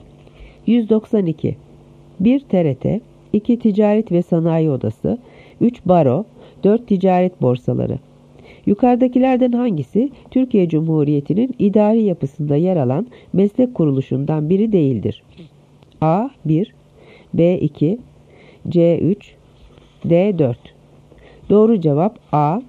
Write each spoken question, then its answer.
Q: Yukarıdakilerden hangisi Türkiye Cumhuriyeti'nin idari yapısında yer alan meslek kuruluşundan biri değildir?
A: Doğru cevap A. 1.